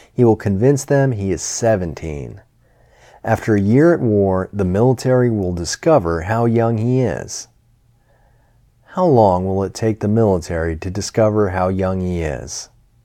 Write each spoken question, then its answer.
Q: How long will it take the military to discover how young he is?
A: It will take the military a year to discover how young he is.